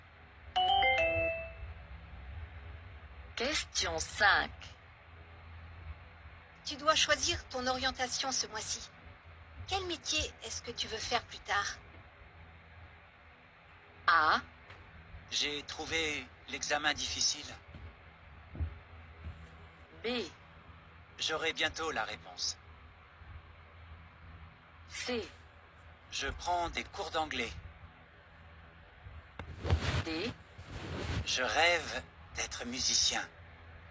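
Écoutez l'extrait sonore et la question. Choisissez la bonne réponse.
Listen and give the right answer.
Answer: Je rêve d'être musicien.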